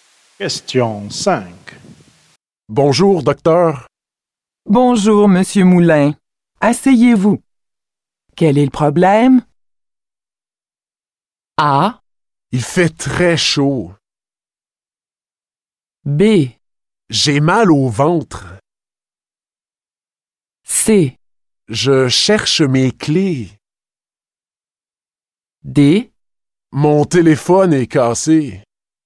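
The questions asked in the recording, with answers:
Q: Asseyez-vous. Quel est le problème?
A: B: J'ai mal au ventre.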